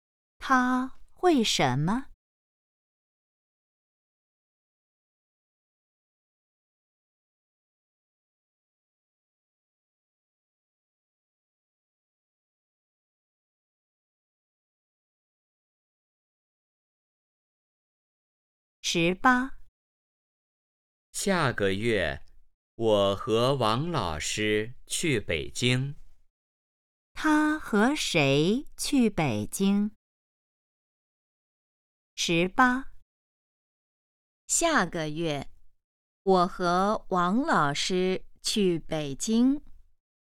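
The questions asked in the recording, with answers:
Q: 他和谁去北京?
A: 王老师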